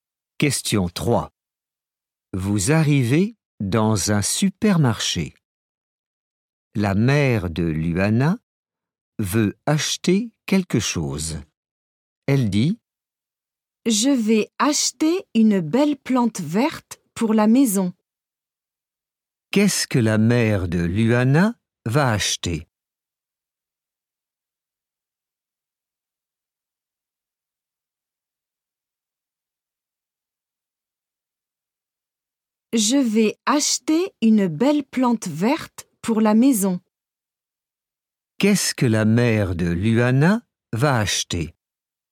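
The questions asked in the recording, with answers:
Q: Qu'est-ce que la mère de Luana va acheter?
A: Une plante verte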